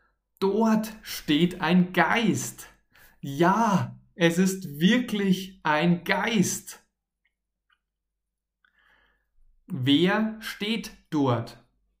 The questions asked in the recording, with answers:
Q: Wer steht dort?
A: Ein Geist. Dort steht ein Geist.